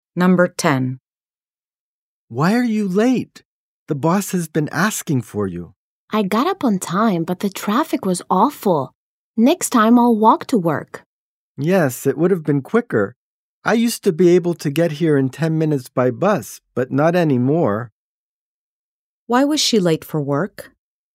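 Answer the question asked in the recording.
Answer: Because the traffic was awful.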